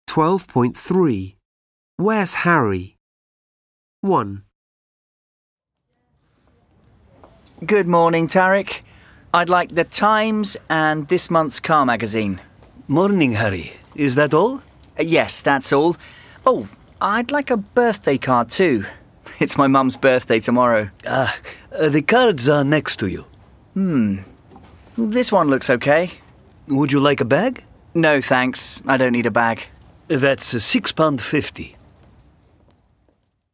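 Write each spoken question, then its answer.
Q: Where's Harry?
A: At a newsagent's (shop)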